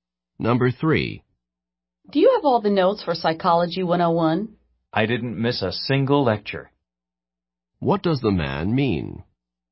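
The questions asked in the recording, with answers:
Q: What does the man mean?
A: He has all the notes because he attended every lecture.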